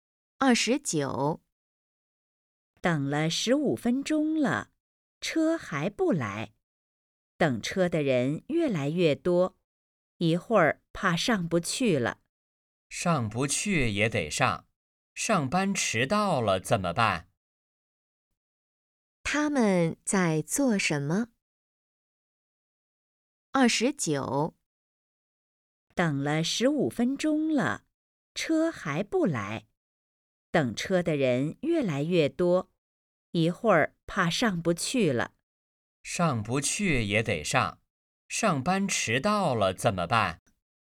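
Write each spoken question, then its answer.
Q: 他们在做什么?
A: 等车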